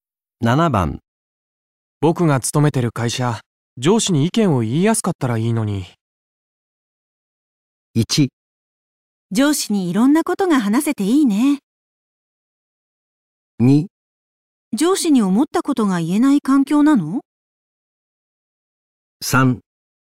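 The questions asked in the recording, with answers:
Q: 僕が勤めてる会社、上司に意見を言いやすかったらいいのに。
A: 2: 上司に思ったことが言えない環境なの?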